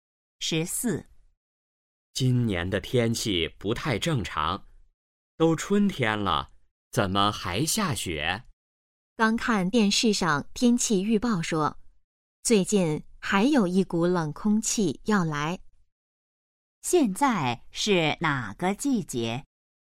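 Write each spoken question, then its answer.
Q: 现在是哪个季节?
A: 春天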